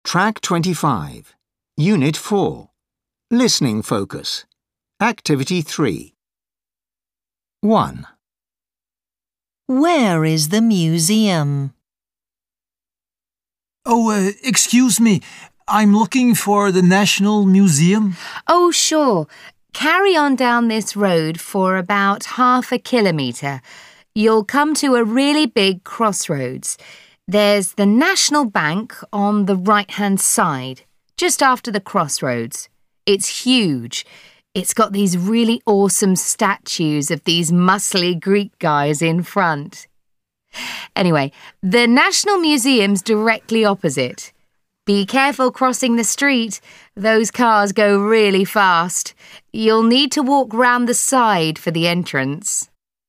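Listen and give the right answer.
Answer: Opposite the National Bank, just after the big crossroads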